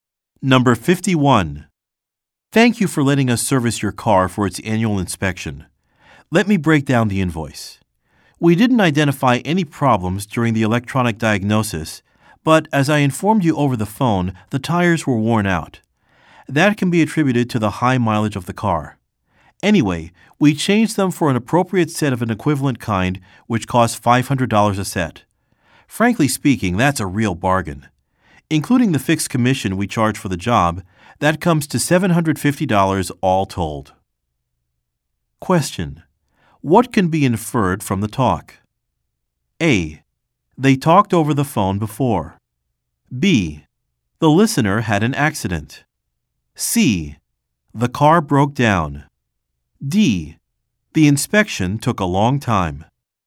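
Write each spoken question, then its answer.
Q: What can be inferred from the talk?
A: A: They talked over the phone before.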